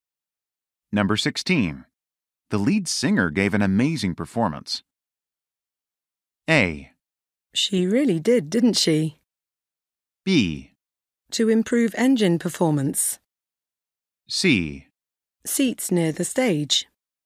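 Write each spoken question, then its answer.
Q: The lead singer gave an amazing performance.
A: A: She really did, didn't she?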